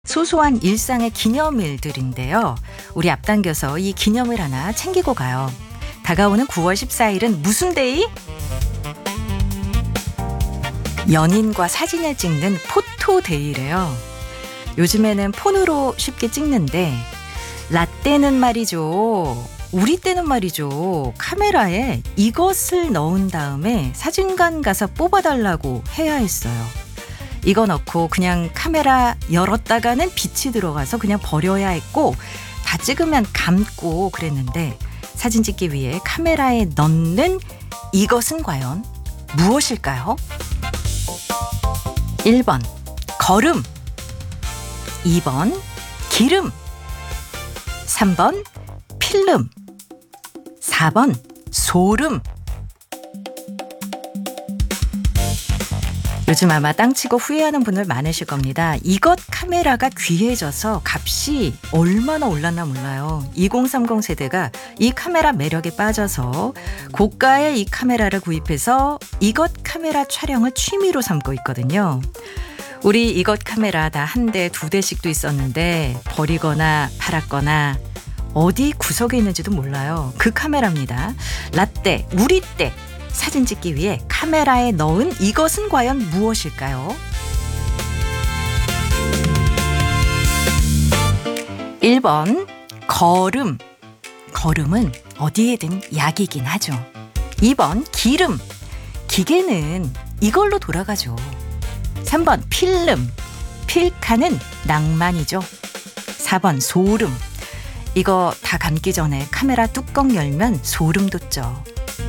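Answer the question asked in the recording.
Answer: 3번: 필름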